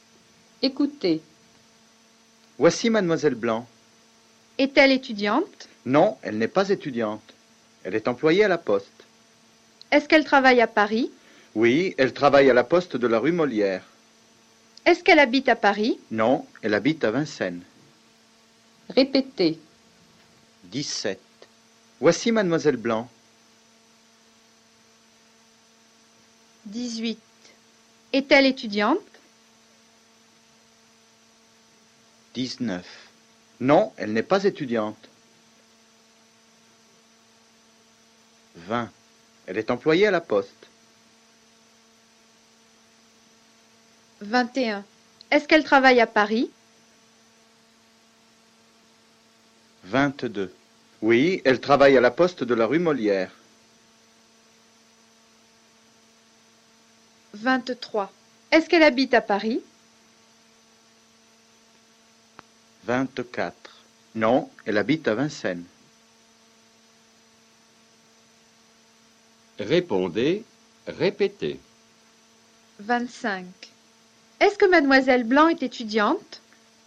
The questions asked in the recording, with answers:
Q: Est-ce que Mademoiselle Blanc est étudiante?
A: Non, elle n'est pas étudiante.